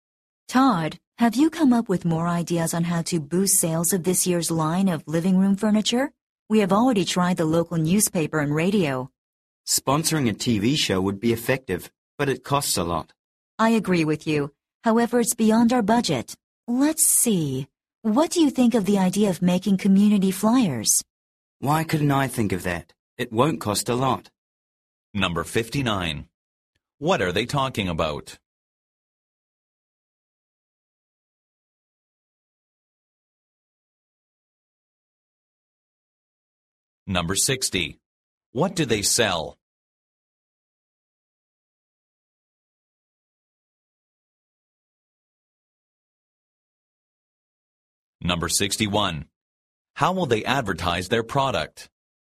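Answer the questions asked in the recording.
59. How to boost sales of their living room furniture (advertising ideas)
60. Living room furniture
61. By making community flyers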